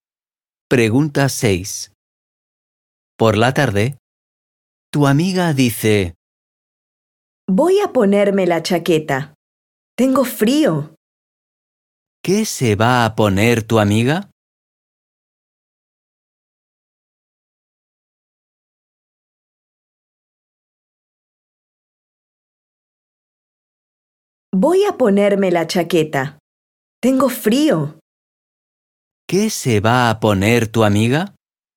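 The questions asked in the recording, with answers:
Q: ¿Qué se va a poner tu amiga?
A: la chaqueta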